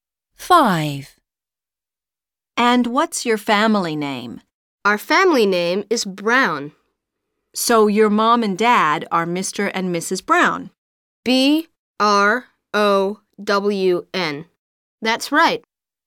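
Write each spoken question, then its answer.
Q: And what's your family name?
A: Brown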